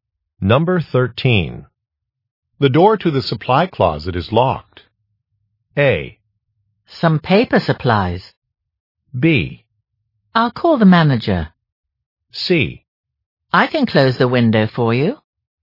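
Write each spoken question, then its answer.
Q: The door to the supply closet is locked.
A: B: I'll call the manager.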